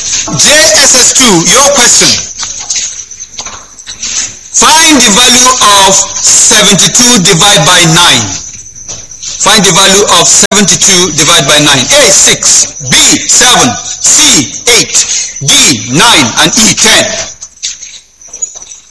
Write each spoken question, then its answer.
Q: Find the value of 72 divided by 9.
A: It's C.